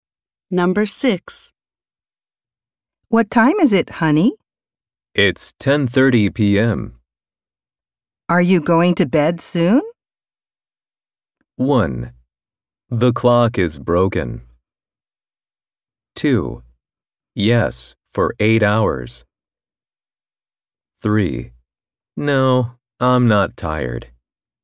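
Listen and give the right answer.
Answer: 3: No, I'm not tired.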